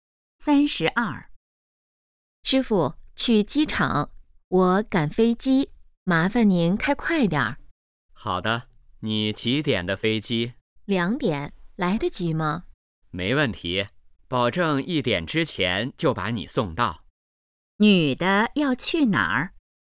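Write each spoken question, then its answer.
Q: 女的要去哪儿?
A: 机场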